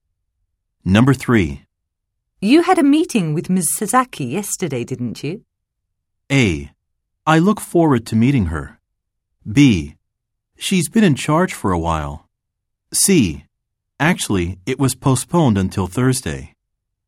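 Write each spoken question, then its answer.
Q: You had a meeting with Ms. Sasaki yesterday, didn't you?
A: C: Actually, it was postponed until Thursday.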